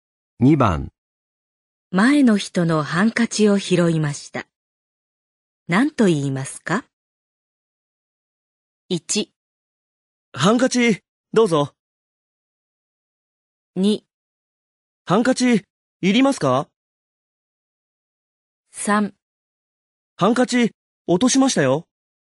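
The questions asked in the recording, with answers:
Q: 前の人のハンカチを拾いました。何と言いますか ?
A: 3: ハンカチ、落としましたよ。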